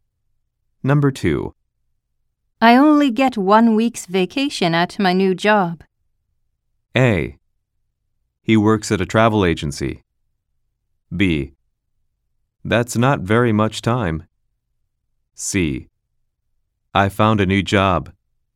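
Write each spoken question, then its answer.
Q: I only get 1 week's vacation at my new job.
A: B: That's not very much time.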